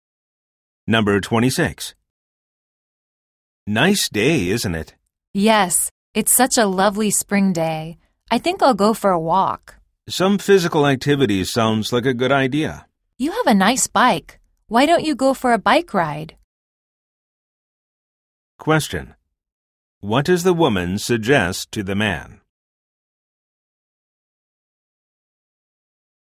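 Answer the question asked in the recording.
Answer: To go for a bike ride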